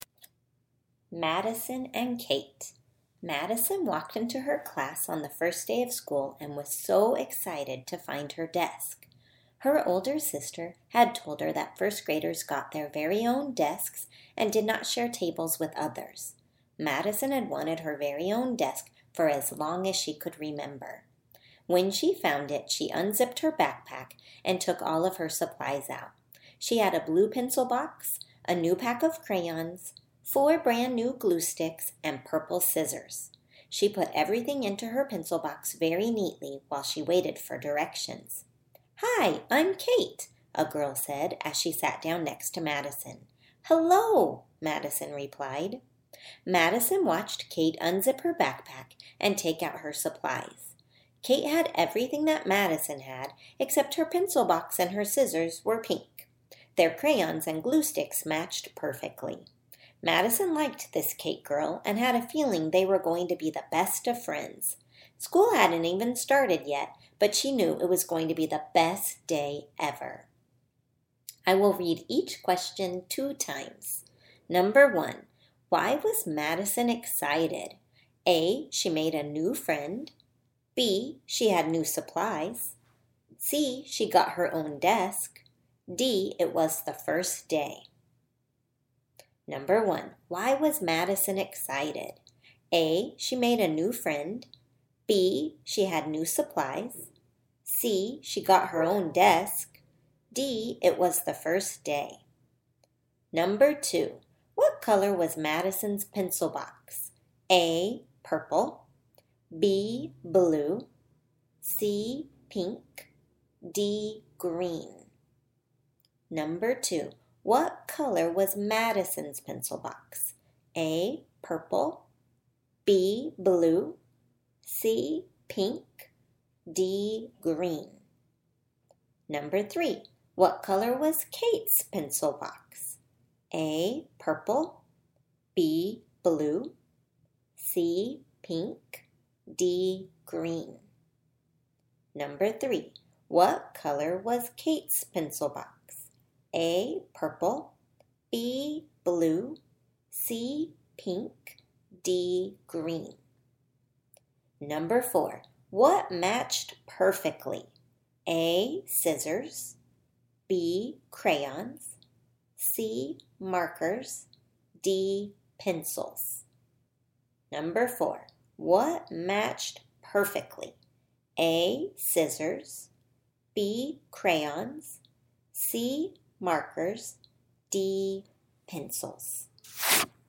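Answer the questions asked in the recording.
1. C: She got her own desk.
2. B: Blue.
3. C: Pink.
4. B: Crayons.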